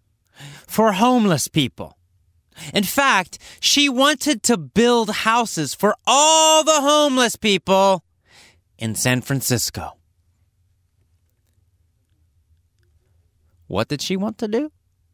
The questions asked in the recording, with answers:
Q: What did she want to do?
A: She wanted to build houses for all the homeless people in San Francisco.